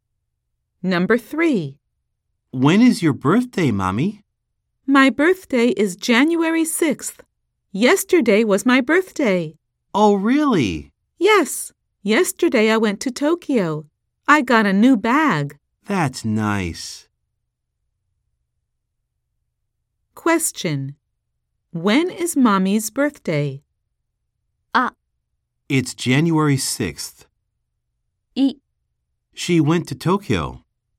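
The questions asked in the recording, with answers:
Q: When is Mommy's birthday?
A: It's January 6th.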